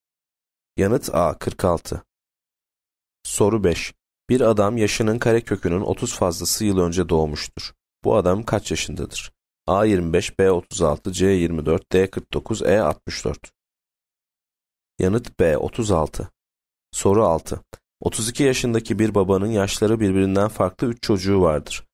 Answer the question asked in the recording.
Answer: Yanıt B 36